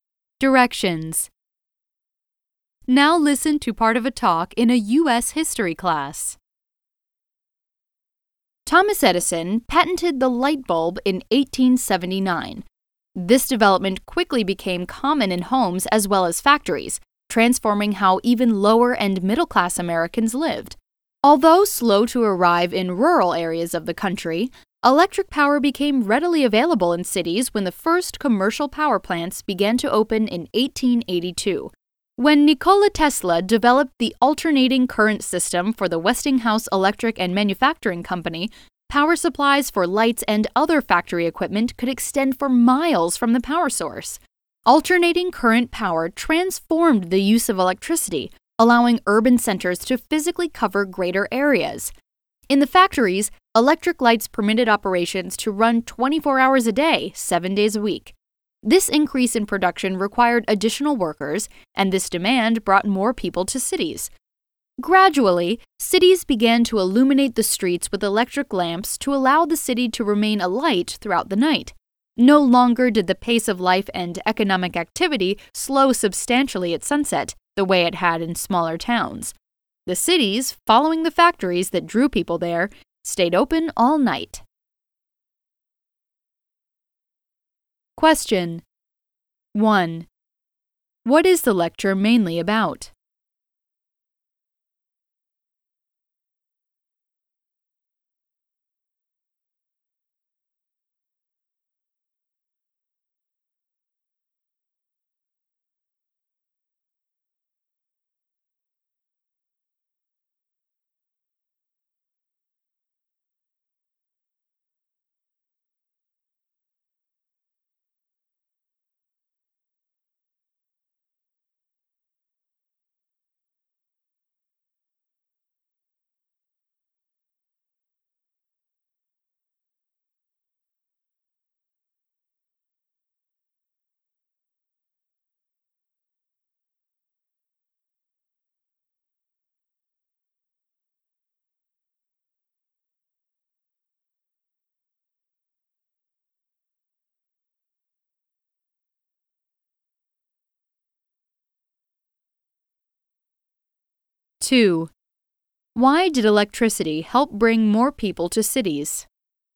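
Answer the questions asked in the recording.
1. How electricity and the light bulb changed American cities and life
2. Electric lights let factories run around the clock, so they needed more workers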